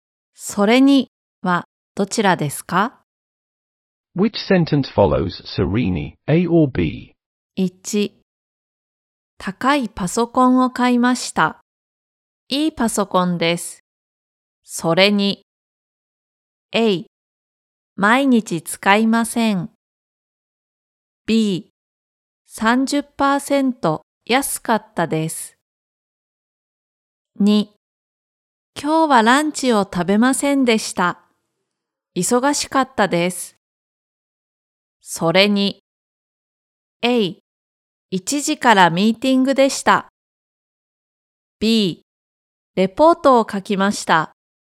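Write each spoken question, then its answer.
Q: 高いパソコンを買いました。いいパソコンです。それに。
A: B: 30%安かったです。

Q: 今日はランチを食べませんでした。忙しかったです。それに。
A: A: 一時からミーティングでした。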